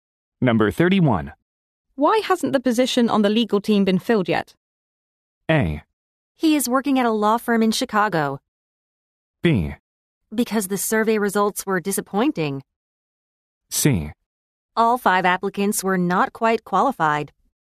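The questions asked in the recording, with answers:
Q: Why hasn't the position on the legal team been filled yet?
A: C: All five applicants were not quite qualified.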